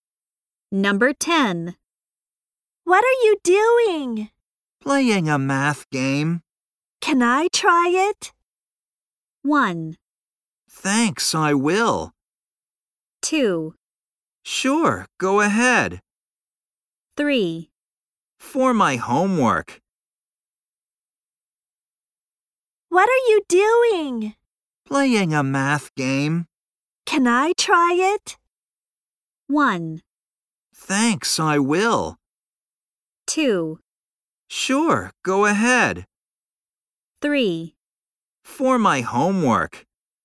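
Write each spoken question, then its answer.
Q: Can I try it?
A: 2: Sure, go ahead.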